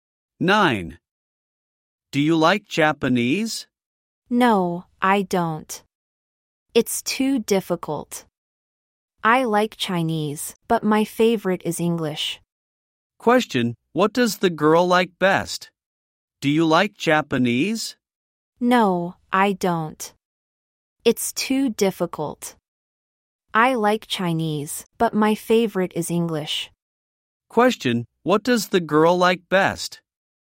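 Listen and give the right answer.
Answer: English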